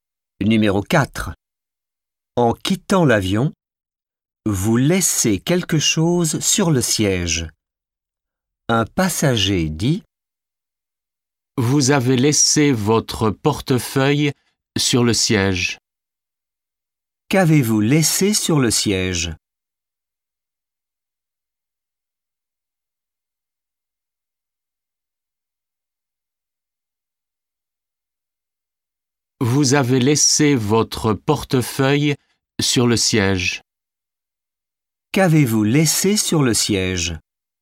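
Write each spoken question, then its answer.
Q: Qu'avez-vous laissé sur le siège ?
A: Votre portefeuille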